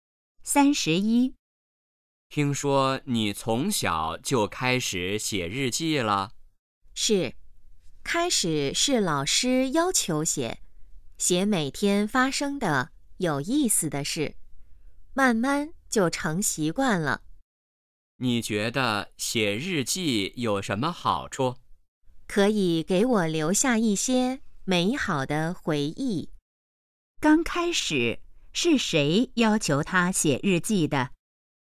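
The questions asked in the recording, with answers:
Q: 刚开始是谁要求他写日记的?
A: 老师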